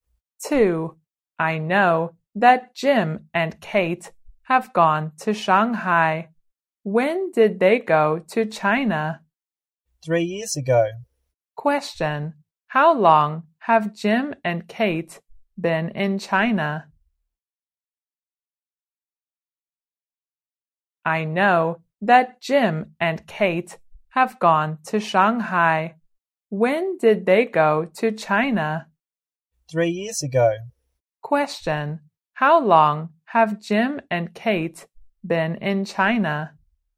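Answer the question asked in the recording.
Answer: For 3 years.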